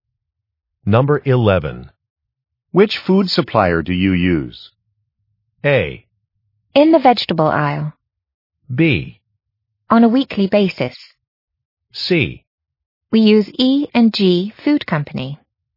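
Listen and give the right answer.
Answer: C: We use E and G Food Company.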